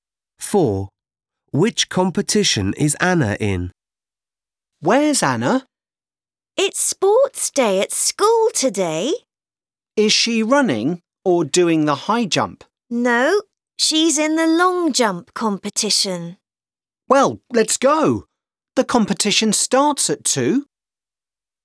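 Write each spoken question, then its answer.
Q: Which competition is Anna in?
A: the long jump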